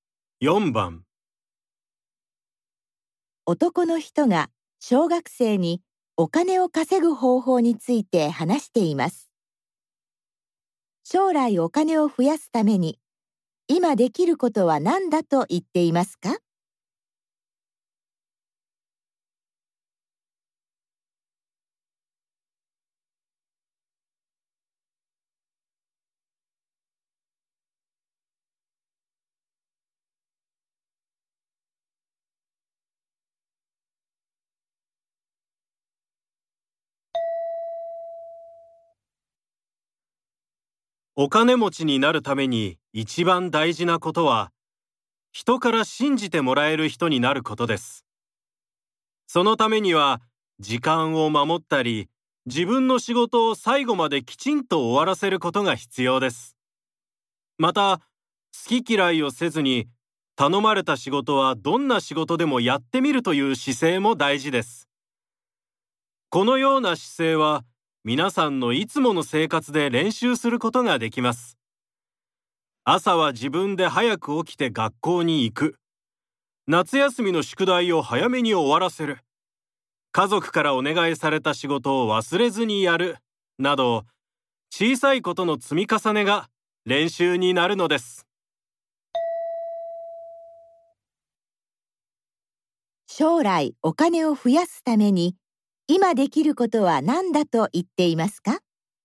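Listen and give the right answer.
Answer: いつもの生活で、人から信じてもらえるようになる練習をすること(早起きする、宿題を早めに終わらせる、頼まれた仕事を忘れずにやるなど)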